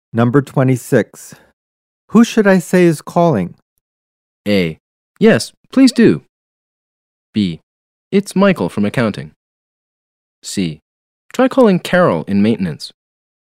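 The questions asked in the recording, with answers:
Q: Who should I say is calling?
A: B: It's Michael from accounting.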